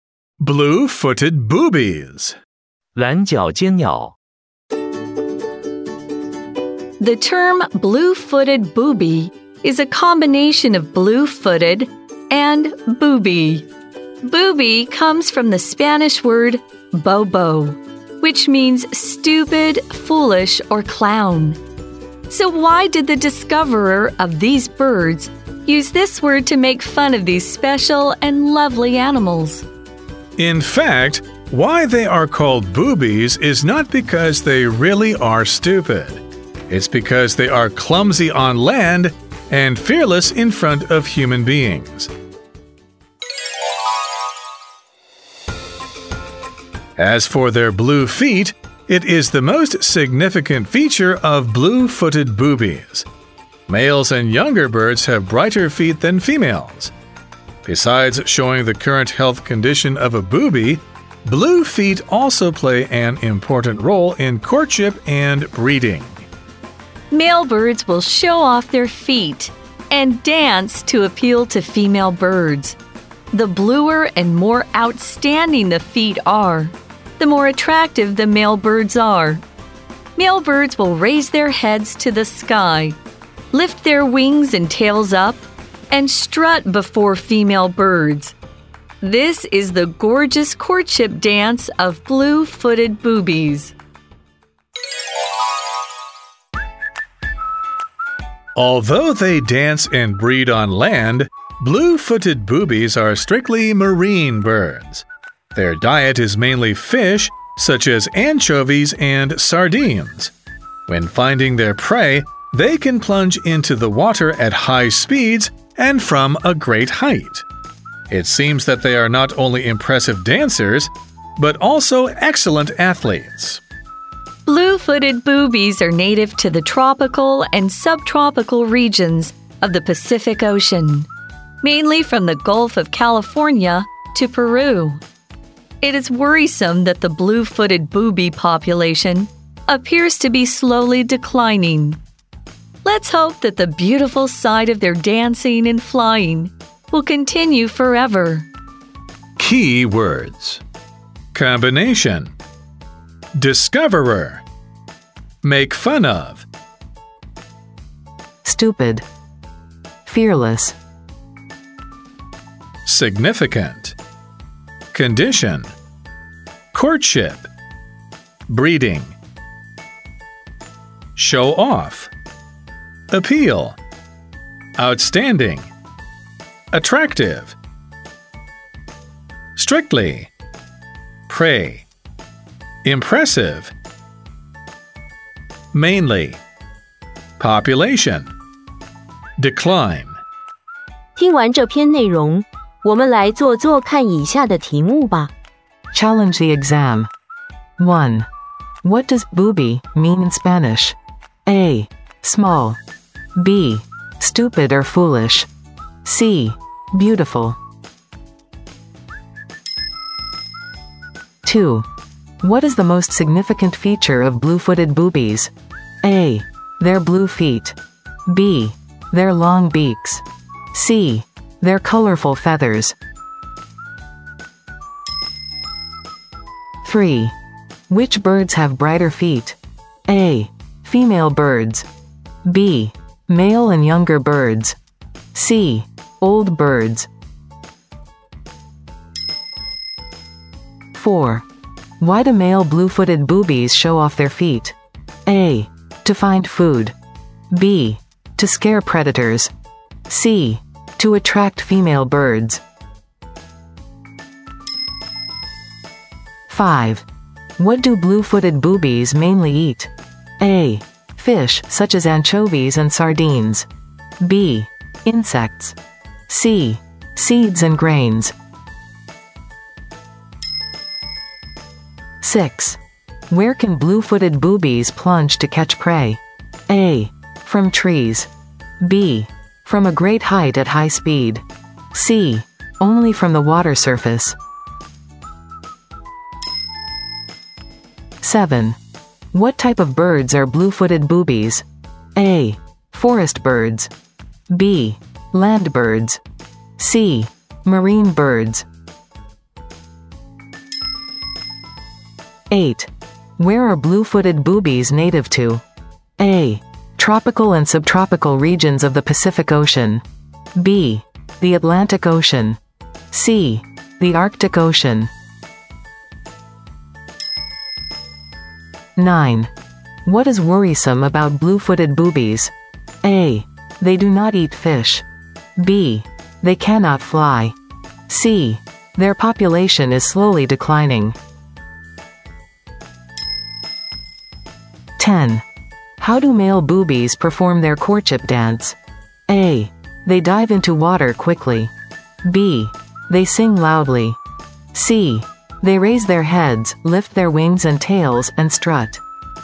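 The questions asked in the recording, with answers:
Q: What does booby mean in Spanish?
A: B: Stupid or foolish.

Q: What is the most significant feature of blue-footed boobies?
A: A: Their blue feet.

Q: Which birds have brighter feet?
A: B: Male and younger birds.

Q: Why do male blue-footed boobies show off their feet?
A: C: To attract female birds.

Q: What do blue-footed boobies mainly eat?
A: A: Fish such as anchovies and sardines.

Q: Where can blue-footed boobies plunge to catch prey?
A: B: From a great height at high speed.

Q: What type of birds are blue-footed boobies?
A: C: Marine birds.

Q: Where are blue-footed boobies native to?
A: A: Tropical and subtropical regions of the Pacific Ocean.

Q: What is worrisome about blue-footed boobies?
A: C: Their population is slowly declining.

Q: How do male boobies perform their courtship dance?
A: C: They raise their heads, lift their wings and tails, and strut.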